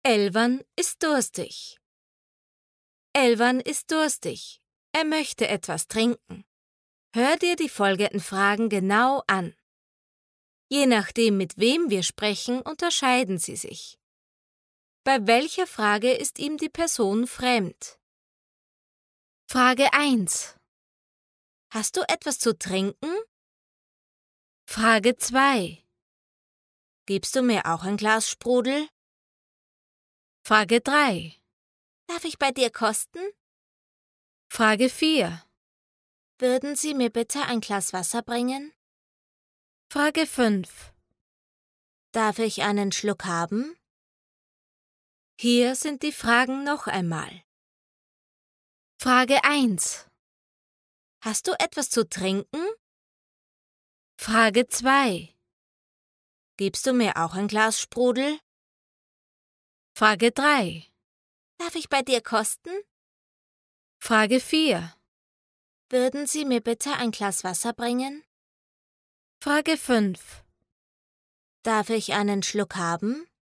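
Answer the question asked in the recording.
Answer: Frage 4: Würden Sie mir bitte ein Glas Wasser bringen?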